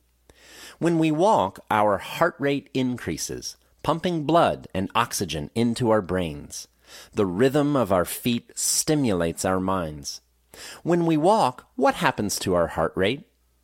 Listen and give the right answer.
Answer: When we walk, our heart rate increases.